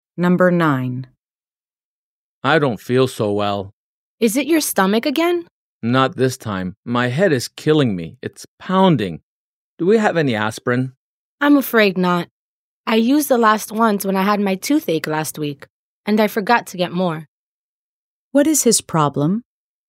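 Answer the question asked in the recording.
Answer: He has a headache.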